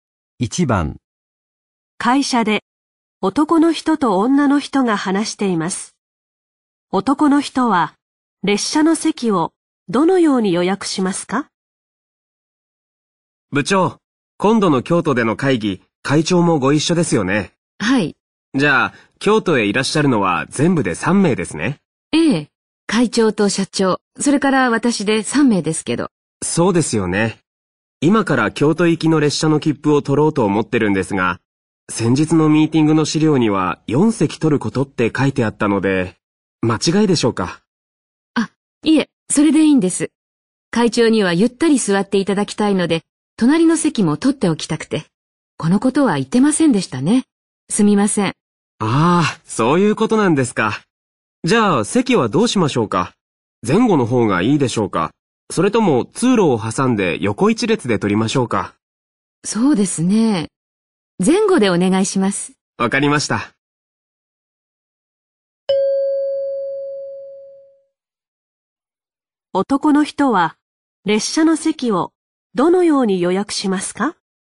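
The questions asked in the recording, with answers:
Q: 男の人は列車の席をどのように予約しますか?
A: 4席を前後に(会長の隣の席も含めて)取る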